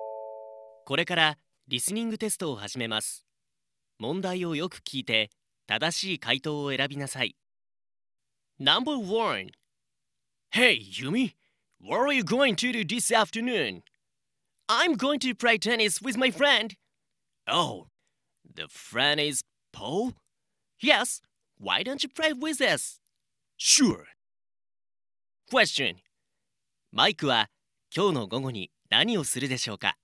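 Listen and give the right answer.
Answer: ユミとポールとテニスをする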